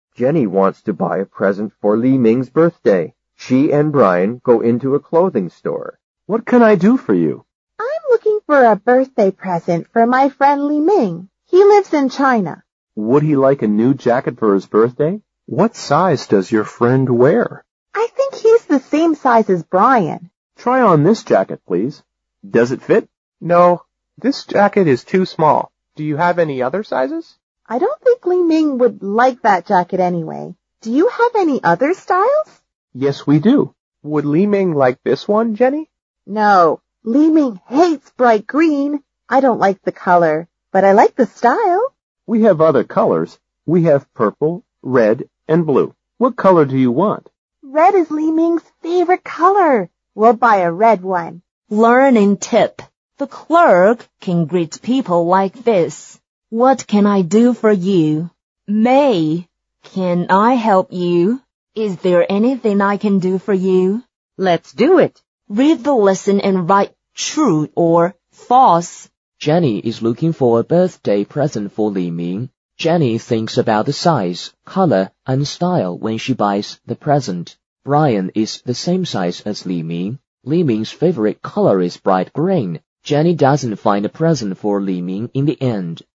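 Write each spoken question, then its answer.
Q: Jenny is looking for a birthday present for Li Ming.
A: True

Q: Jenny thinks about the size, color, and style when she buys the present.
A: True

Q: Brian is the same size as Li Ming.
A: True

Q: Li Ming's favorite color is bright green.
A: False

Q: Jenny doesn't find a present for Li Ming in the end.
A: False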